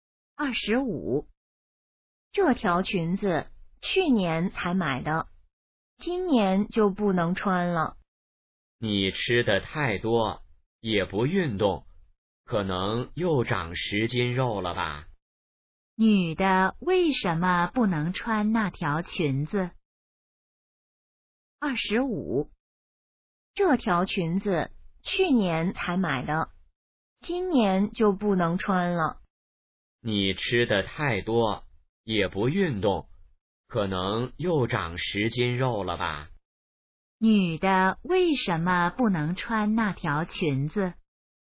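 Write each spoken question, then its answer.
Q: 女的为什么不能穿那条裙子?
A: 她变胖了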